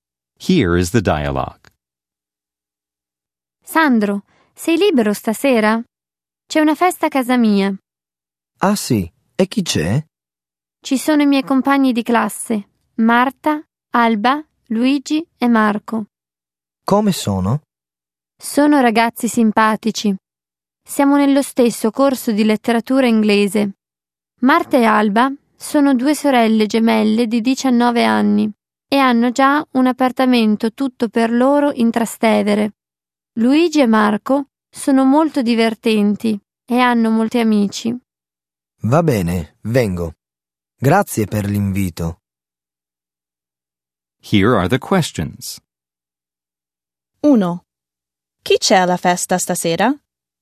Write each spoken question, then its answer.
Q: Chi c'è alla festa stasera?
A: Ci sono Marta, Alba, Luigi e Marco.